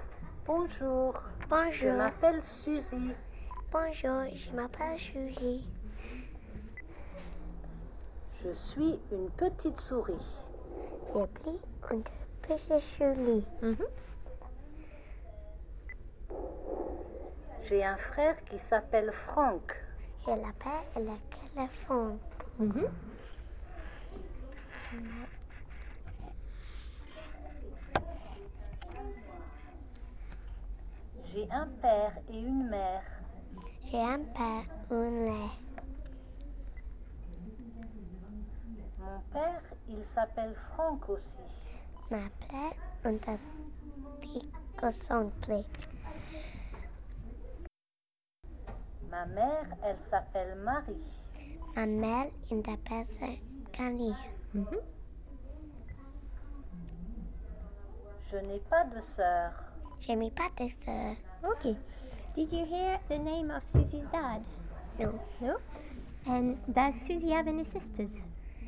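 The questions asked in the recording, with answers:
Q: Did you hear the name of Susie's dad?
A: Yes, Franck

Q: And does Susie have any sisters?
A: No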